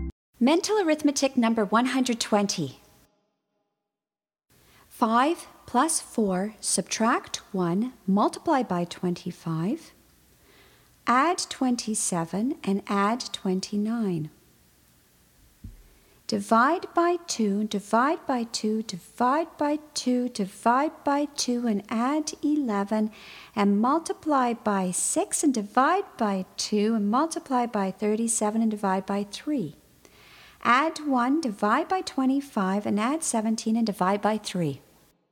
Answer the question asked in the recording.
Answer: And the answer is 19.